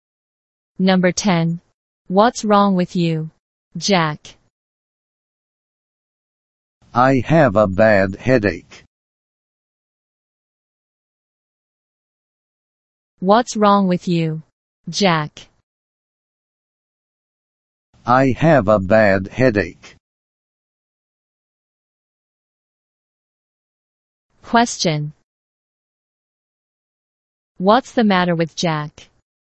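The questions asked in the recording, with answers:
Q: What's the matter with Jack?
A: He has a bad headache.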